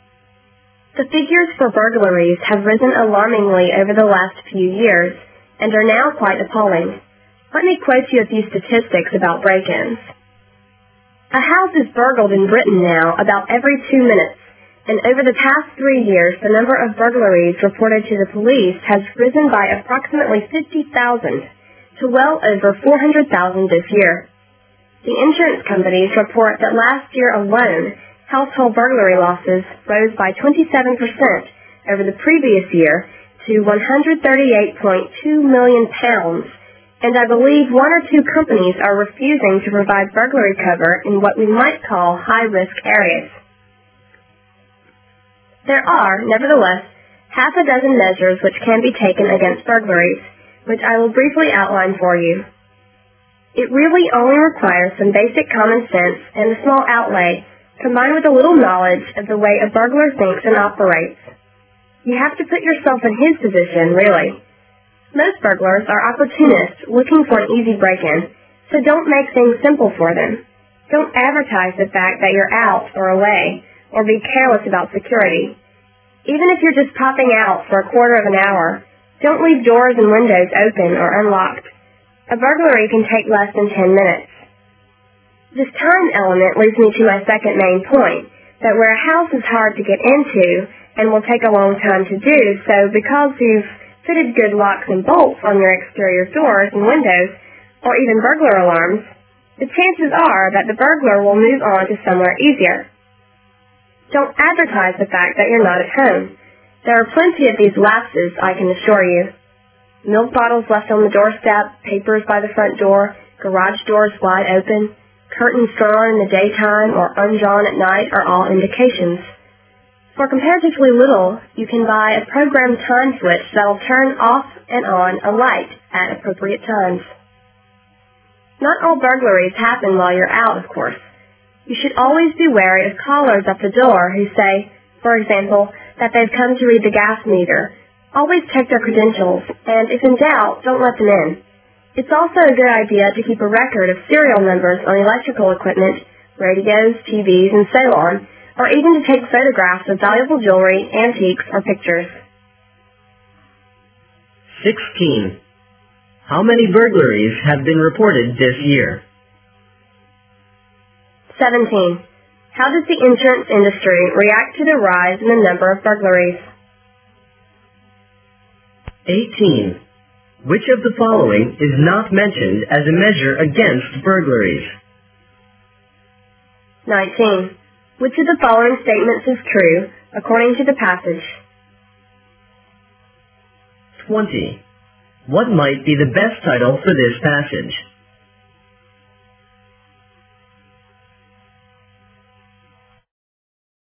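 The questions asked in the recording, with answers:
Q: How many burglaries have been reported this year?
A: Well over 400,000

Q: How does the insurance industry react to the rise in the number of burglaries?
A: Some companies refuse burglary cover in high-risk areas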